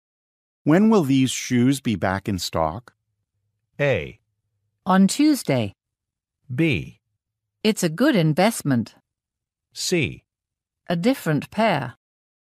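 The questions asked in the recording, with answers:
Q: When will these shoes be back in stock?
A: A: On Tuesday.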